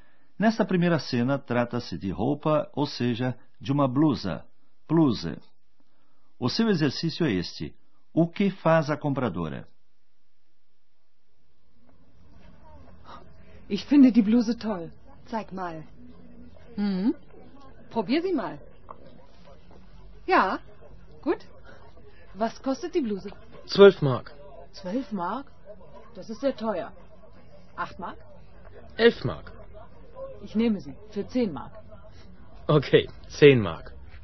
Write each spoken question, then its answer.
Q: O que faz a compradora?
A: O comprador pechincha tentando obter um preço mais baixo.